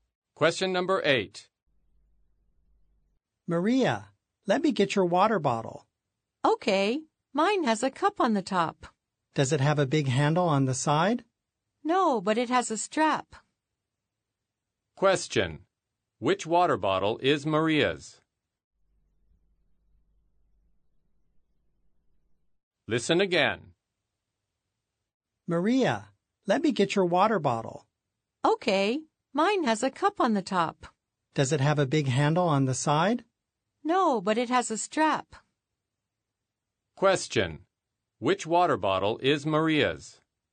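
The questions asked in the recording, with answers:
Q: Which water bottle is Maria's?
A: The one with a cup on top and a strap, but no big handle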